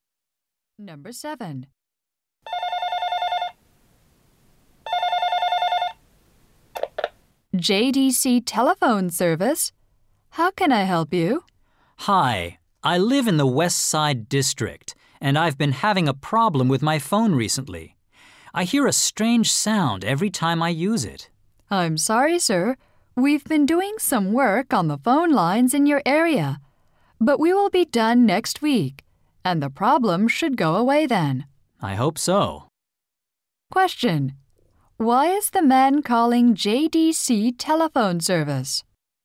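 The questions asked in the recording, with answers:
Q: Why is the man calling JDC telephone service?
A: He hears a strange sound on his phone.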